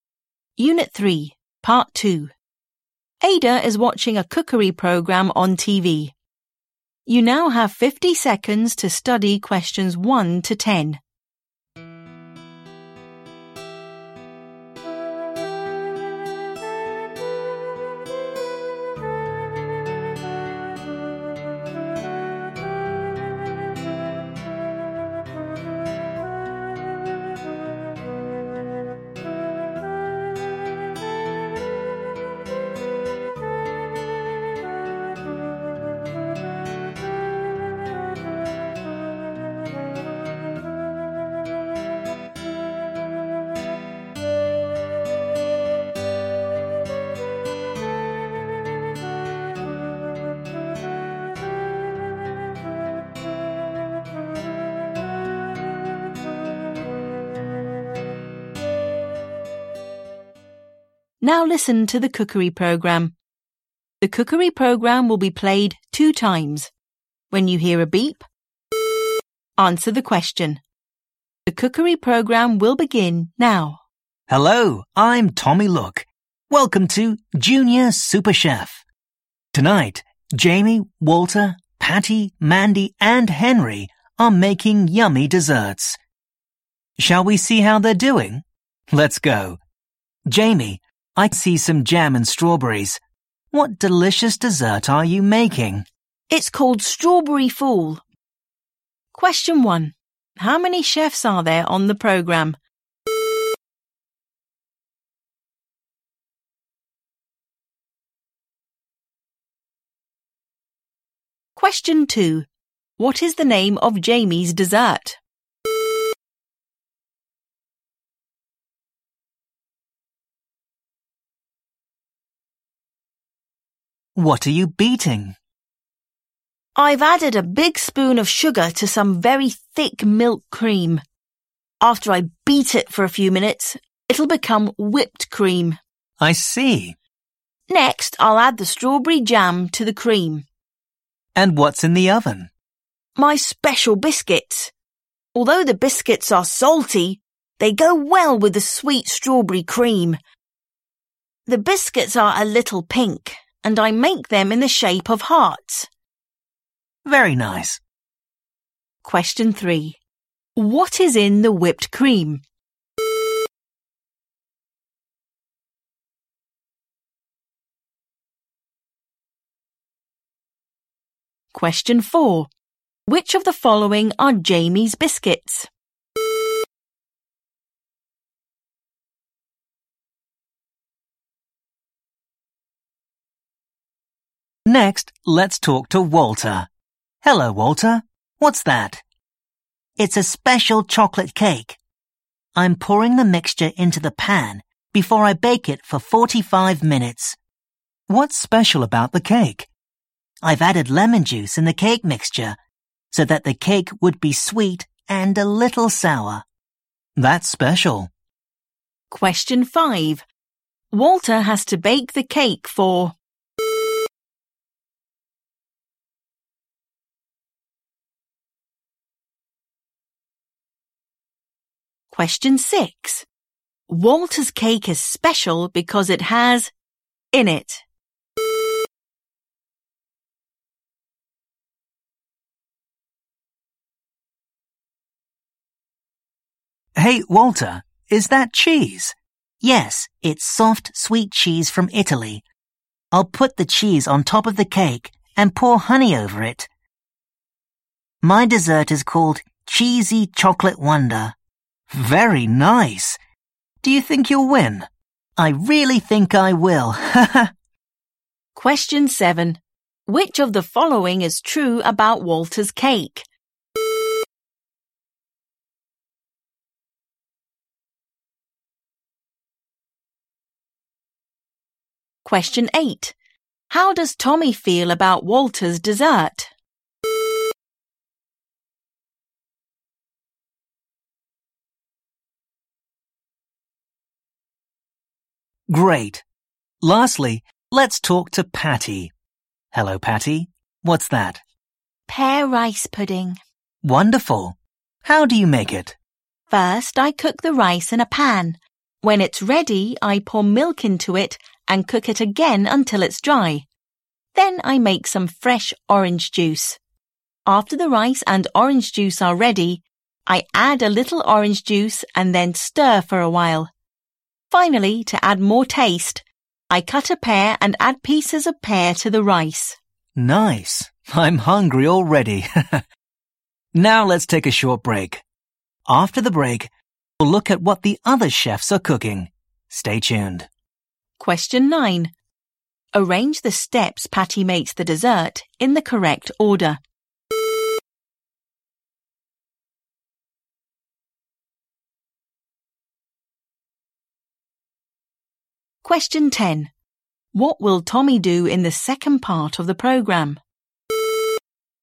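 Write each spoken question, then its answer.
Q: How many chefs are there on the program?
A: Five

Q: What is the name of Jamie's dessert?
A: Strawberry Fool

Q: Walter has to bake the cake for...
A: 45 minutes

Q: Walter's cake is special because it has in it.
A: Lemon juice

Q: What will Tommy do in the second part of the program?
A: Look at what the other chefs are cooking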